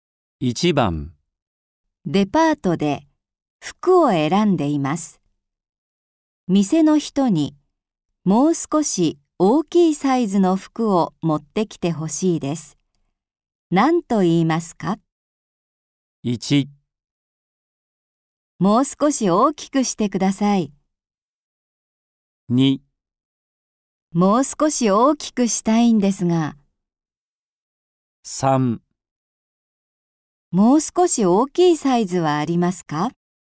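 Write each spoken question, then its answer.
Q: 何と言いますか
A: 3: もう少し大きいサイズはありますか?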